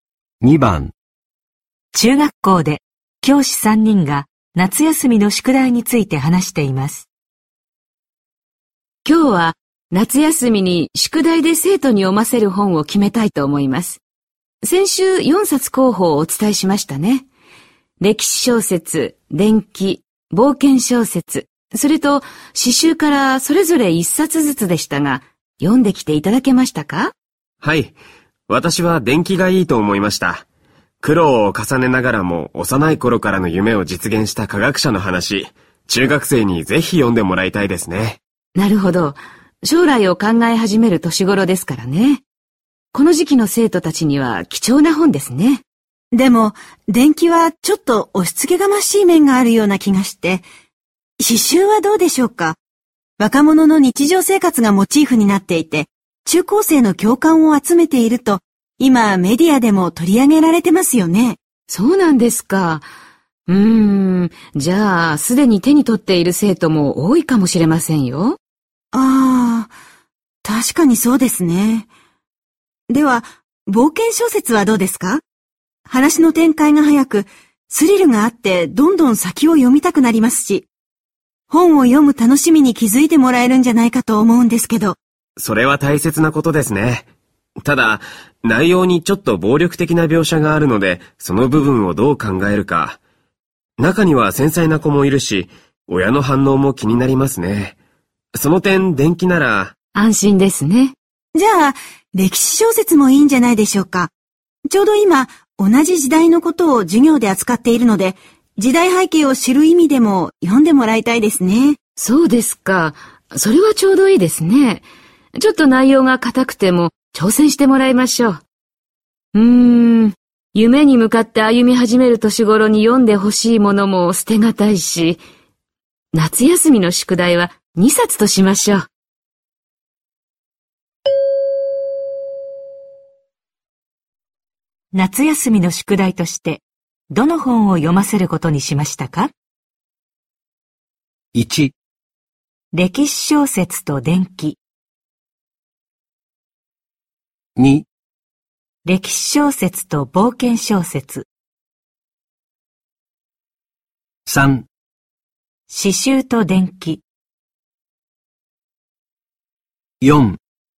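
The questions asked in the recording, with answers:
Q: 夏休みの宿題としてどの本を読ませることにしましたか?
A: 1: 歴史小説と伝記。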